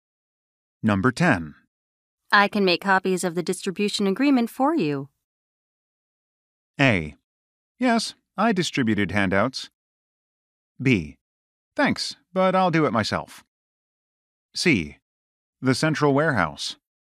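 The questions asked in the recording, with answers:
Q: I can make copies of the distribution agreement for you.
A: B: Thanks, but I'll do it myself.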